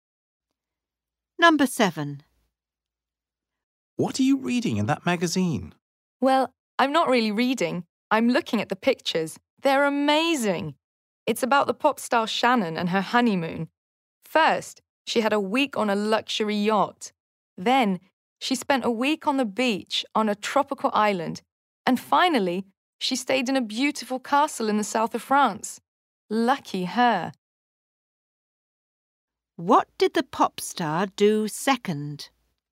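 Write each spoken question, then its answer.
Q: What did the pop star do second?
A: She spent a week on the beach on a tropical island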